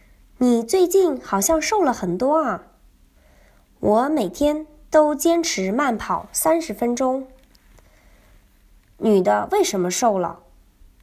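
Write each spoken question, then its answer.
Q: 女的为什么瘦了?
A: 每天坚持慢跑30分钟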